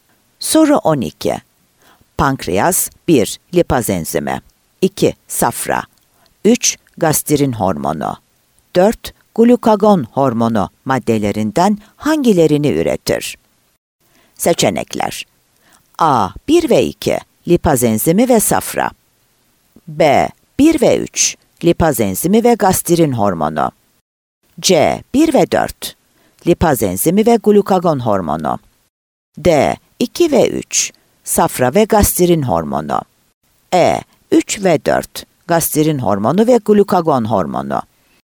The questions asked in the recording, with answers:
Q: Glukagon hormonu maddelerinden hangilerini üretir?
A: Ceyhan